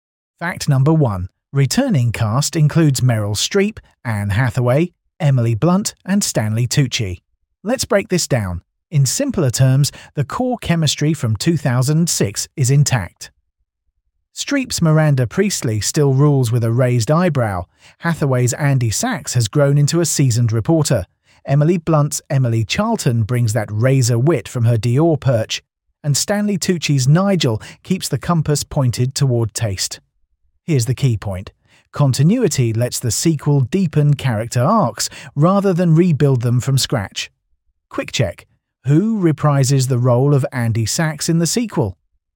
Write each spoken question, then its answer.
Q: Who reprises the role of Andy Sachs in the sequel?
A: Correct answer. Anne Hathaway.